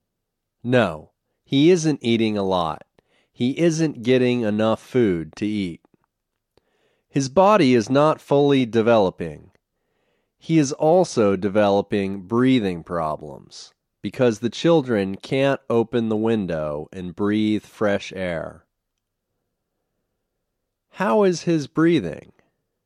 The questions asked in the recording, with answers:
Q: How is his breathing?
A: His breathing isn't good.